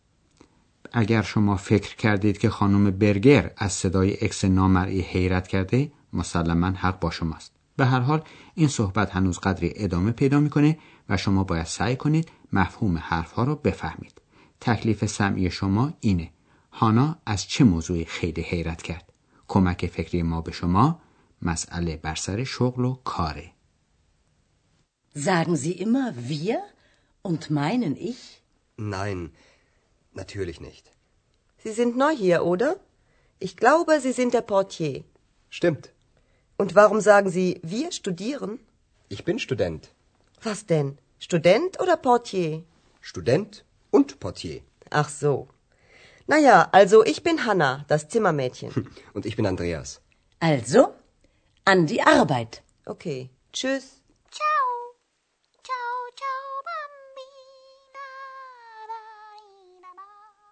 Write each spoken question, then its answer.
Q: هانا از چه موضوعی خیلی حیرت کرد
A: هانا از این تعجب میکنه که آندراس میگه که دانشجوست چون قبلا حرف هانا رو تصدیق کرده و گفته بود که دربان یا بهتر بگیم کارمند قسمت پذیرش هتل.